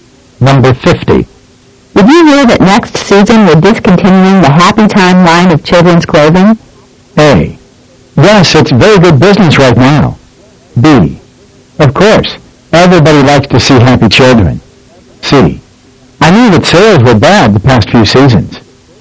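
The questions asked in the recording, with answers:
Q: Did you hear that next season we're discontinuing the Happy Time line of children's clothing?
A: C: I knew that sales were bad the past few seasons.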